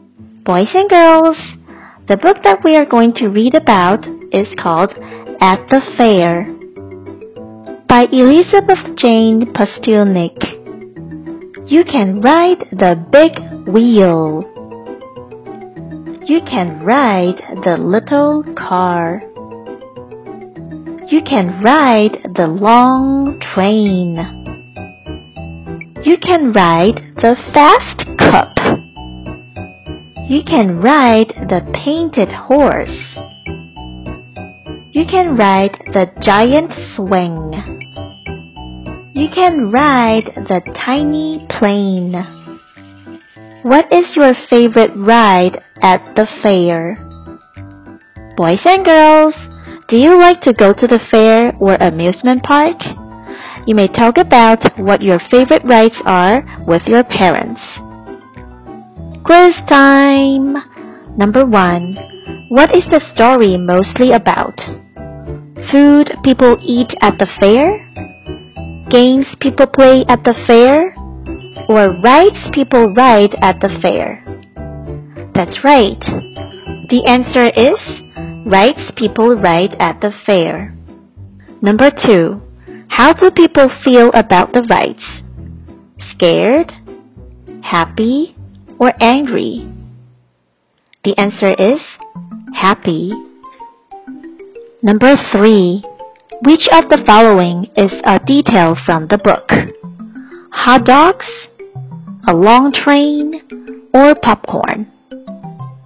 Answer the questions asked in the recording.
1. The answer is Rights people ride at the fair.
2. The answer is happy.
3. The answer is a long train.